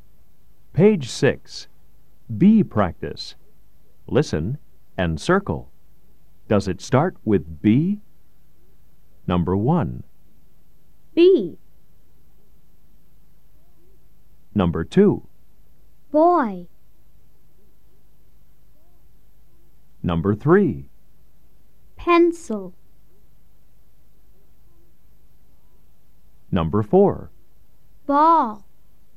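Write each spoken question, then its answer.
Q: Number 2.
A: Yes (boy)

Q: Number 3.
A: No (pencil)

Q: Number 4.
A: Yes (ball)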